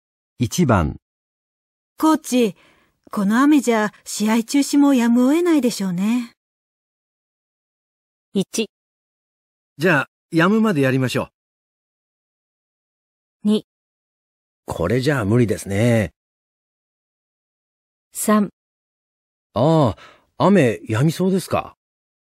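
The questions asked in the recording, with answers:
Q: コーチ、この雨じゃ試合中止もやむを得ないでしょうね。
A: 2: これじゃ無理ですね。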